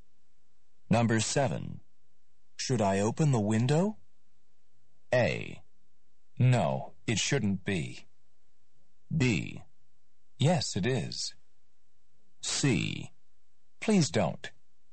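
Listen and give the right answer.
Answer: C: Please don't.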